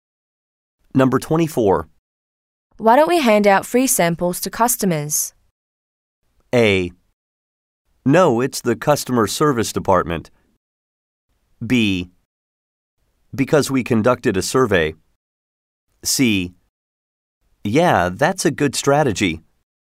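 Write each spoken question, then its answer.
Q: Why don't we hand out free samples to customers?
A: C: Yeah, that's a good strategy.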